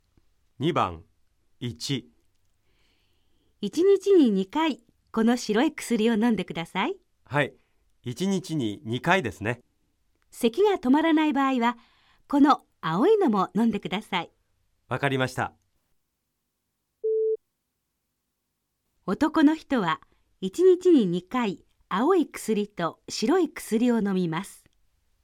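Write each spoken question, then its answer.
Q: 男の人は1日に2回青い薬と白い薬を飲みます。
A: ×(間違い)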